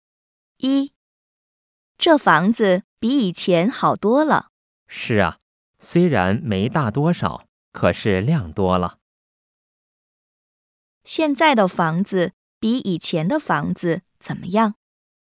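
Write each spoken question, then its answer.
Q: 现在的房子比以前的房子怎么样?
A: 比以前好多了,亮多了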